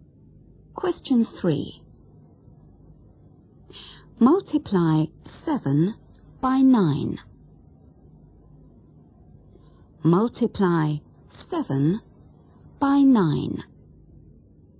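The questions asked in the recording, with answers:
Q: Multiply 7 by 9.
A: 63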